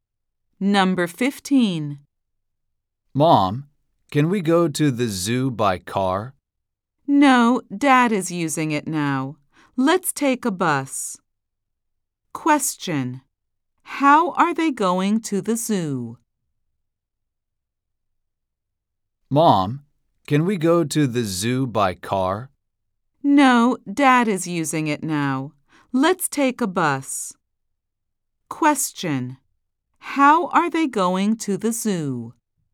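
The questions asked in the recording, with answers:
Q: How are they going to the zoo?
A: By bus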